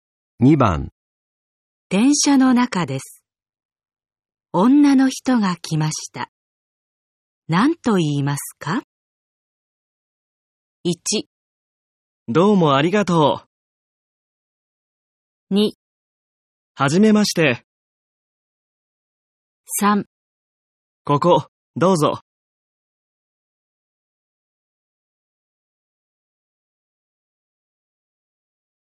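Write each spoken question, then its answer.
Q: 電車の中です。女の人が来ました。何と言いますか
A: 3: ここ、どうぞ。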